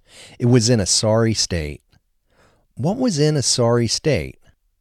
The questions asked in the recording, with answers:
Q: What was in a sorry state?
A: The plane was in a sorry state.